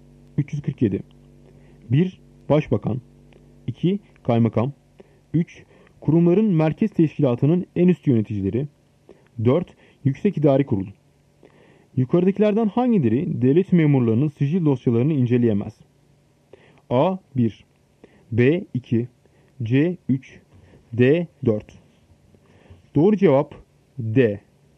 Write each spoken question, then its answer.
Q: Yukarıdakilerden hangileri devlet memurlarının sicil dosyalarını inceleyemez?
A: Doğru cevap D. 4.